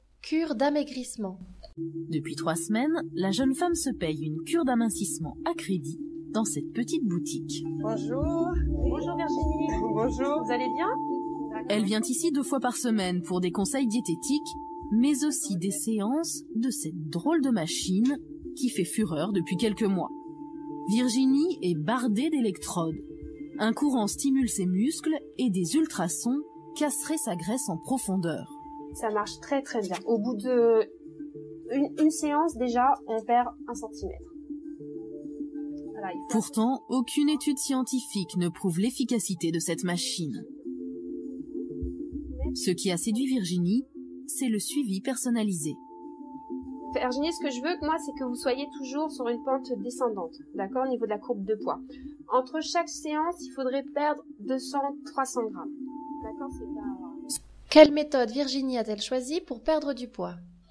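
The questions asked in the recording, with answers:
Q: Quelle méthode Virginie a-t-elle choisie pour perdre du poids ?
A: Une cure d'amincissement en boutique : conseils diététiques et séances d'une machine à électrodes et ultrasons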